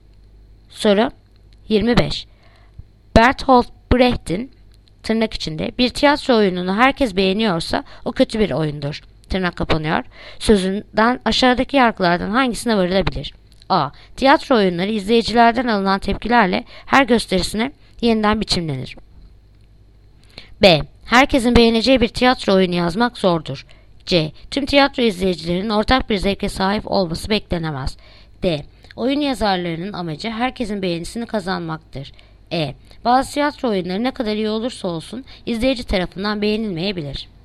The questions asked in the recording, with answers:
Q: Sözünden aşağıdaki yargılardan hangisine varılabilir?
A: Ceyhan. Tüm tiyatro izleyicilerinin ortak bir zevke sahip olması beklenemez.